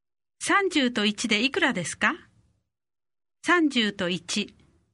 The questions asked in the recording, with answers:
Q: 30と1でいくらですか30と1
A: 31